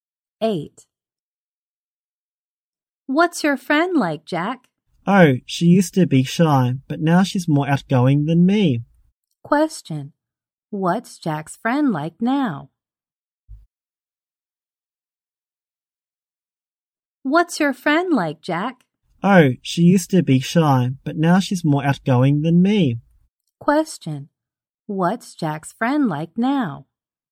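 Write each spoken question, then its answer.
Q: What's Jack's friend like now?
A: Outgoing.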